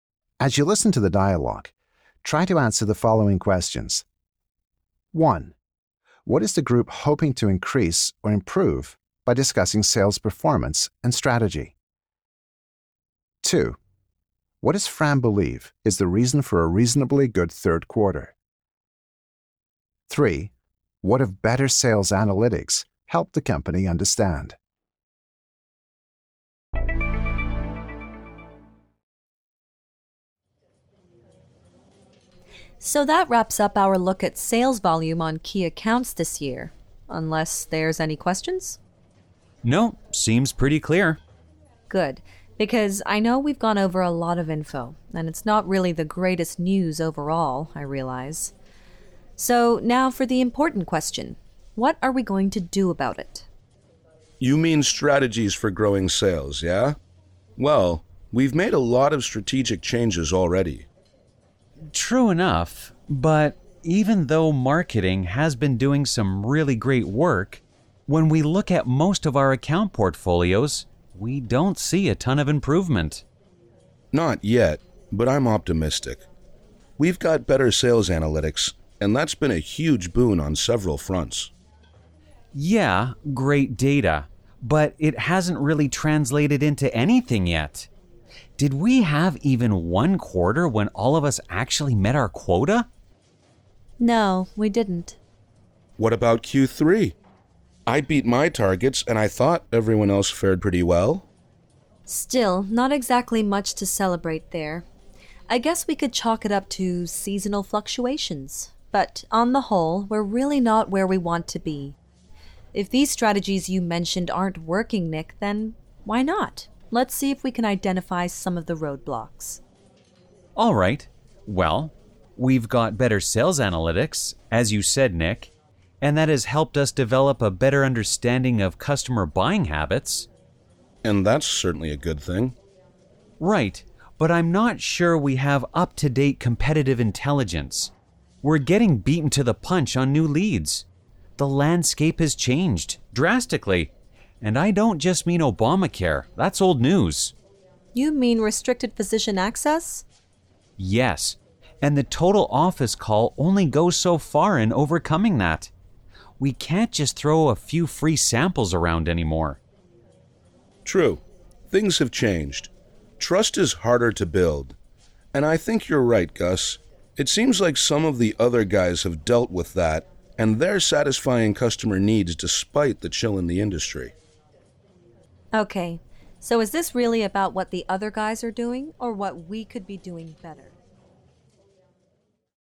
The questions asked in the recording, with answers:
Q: What is the group hoping to increase or improve by discussing sales performance and strategy?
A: As Nick says, they need strategies for growing sales.

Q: What does Fran believe is the reason for a reasonably good third quarter?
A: In fact, she thinks they could chalk it up to, or blame it on, seasonal fluctuations, which affects a lot of companies' sales.

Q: What have better sales analytics helped the company understand?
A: What that data has done for the company is given them good information on customer buying habits.